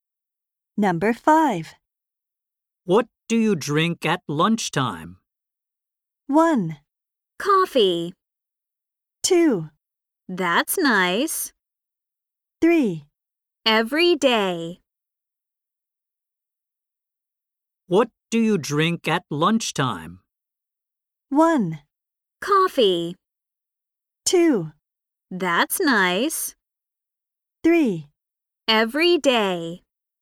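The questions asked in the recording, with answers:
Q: What do you drink at lunchtime?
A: 1: Coffee.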